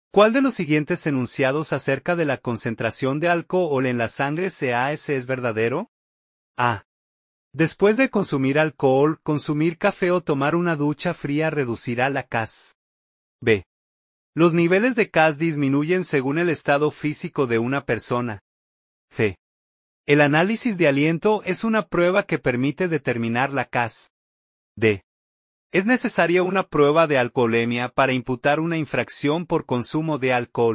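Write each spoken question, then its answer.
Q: ¿Cuál de los siguientes enunciados acerca de la concentración de alcohol en la sangre CAS es verdadero?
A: C: El análisis de aliento es una prueba que permite determinar la CAS.

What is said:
CUAL DE LOS SIGUIENTES ENUNCIADOS ACERCA DE LA CONCENTRACIÓN DE ALCOHOL EN LA SANGRE (CAS) ES VERDADERO?
DESPUÉS DE CONSUMIR ALCOHOL, CONSUMIR CAFÉ O TOMAR UNA DUCHA FRÍA REDUCIRÁ LA CAS.
B. LOS NIVELES DE CAS DISMINUYEN SEGÚN EL ESTADO FÍSICO DE UNA PERSONA.
C. EL ANÁLISIS DE ALIENTO ES UNA PRUEBA QUE PERMITE DETERMINAR LA CAS.
ES NECESARIA UNA PRUEBA DE ALCOHOLEMIA PARA IMPUTAR UNA INFRACCIÓN POR CONSUMO DE ALCOHOL.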